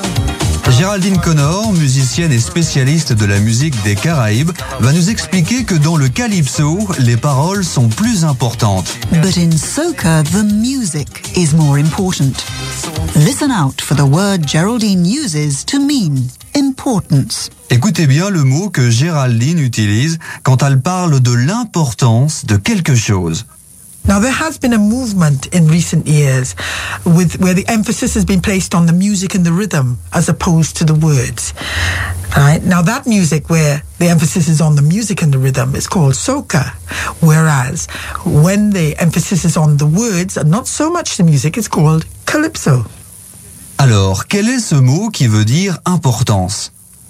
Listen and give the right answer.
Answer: Emphasis. The word Geraldine used to mean importance is emphasis.